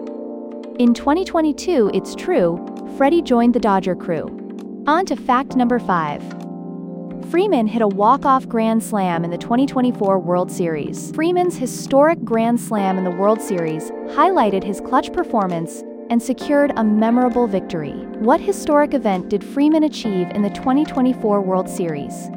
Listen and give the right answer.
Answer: Correct answer, walk-off Grand Slam.